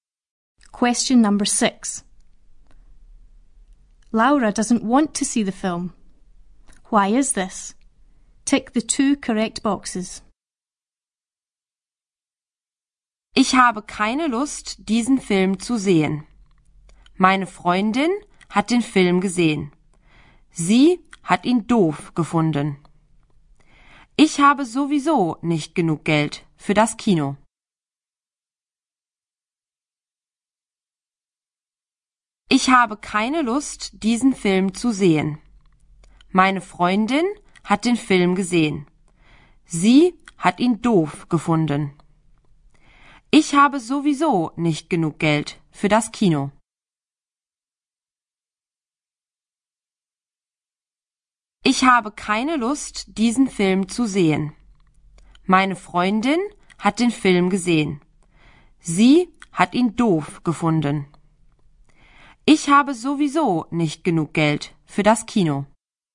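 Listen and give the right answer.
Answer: Her friend saw it and found it stupid; she hasn't got enough money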